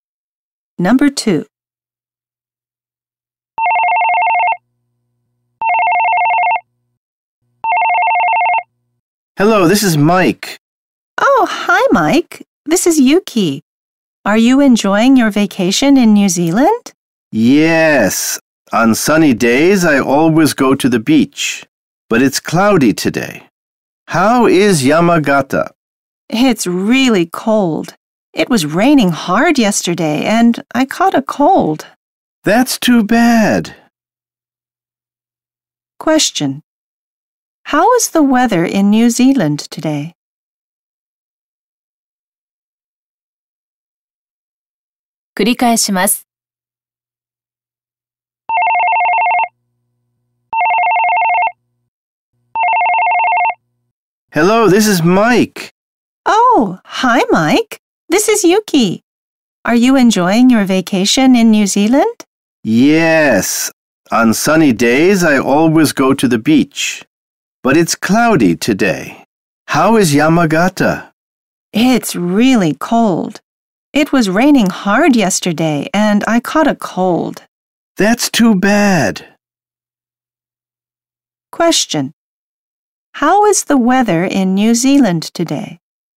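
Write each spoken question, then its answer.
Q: How is the weather in New Zealand today?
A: It's cloudy.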